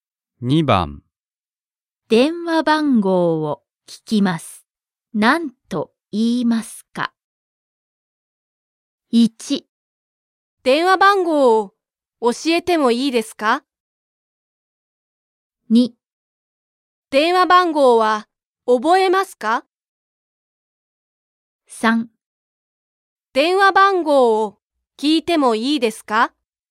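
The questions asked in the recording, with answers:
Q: 電話番号を聞きます。何と言いますか?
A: 3: 電話番号を聞いてもいいですか?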